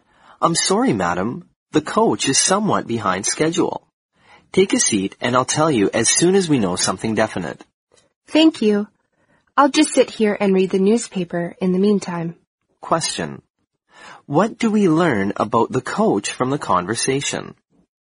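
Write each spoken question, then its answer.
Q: What do we learn about the coach from the conversation?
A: It is running late.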